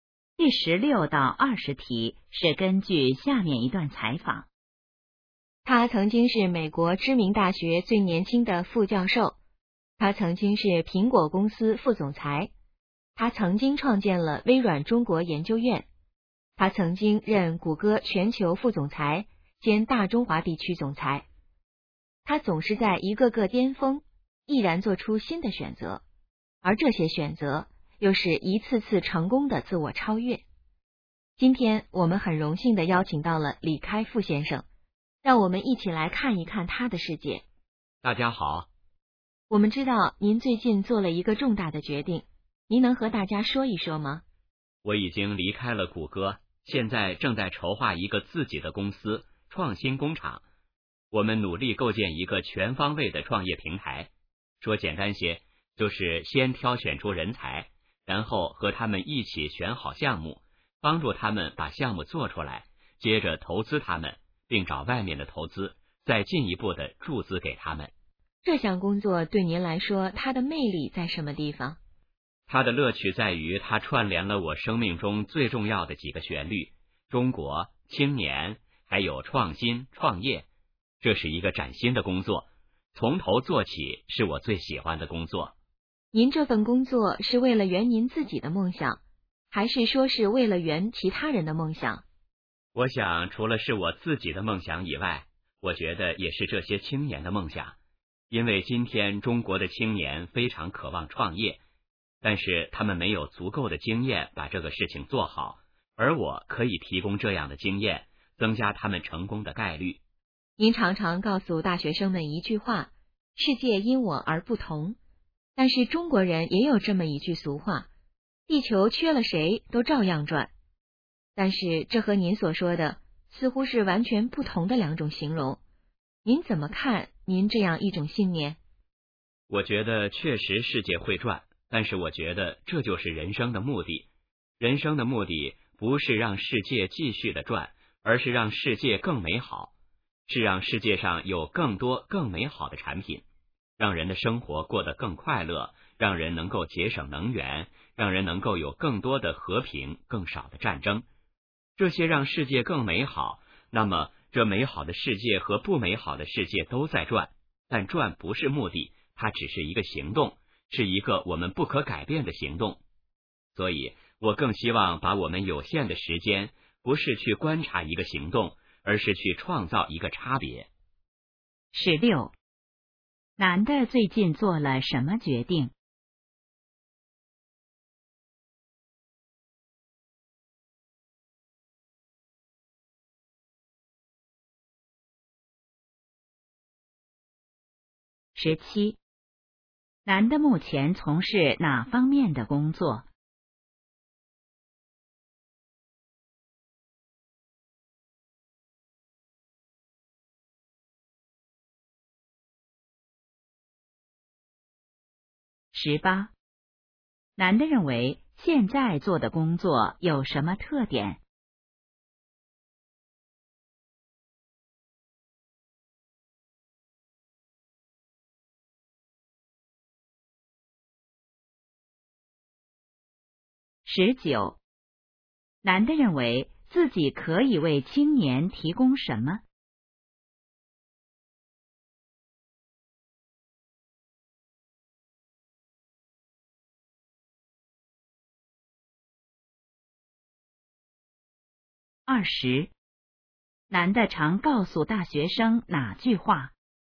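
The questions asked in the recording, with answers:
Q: 男的最近做了什么决定?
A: 离开谷歌,筹划自己的公司创新工厂

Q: 男的目前从事哪方面的工作?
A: 构建创业平台,帮助青年创业并投资

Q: 男的认为现在做的工作有什么特点?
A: 是崭新的工作,从头做起

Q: 男的认为自己可以为青年提供什么?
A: 创业经验

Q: 男的常告诉大学生哪句话?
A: 世界因我而不同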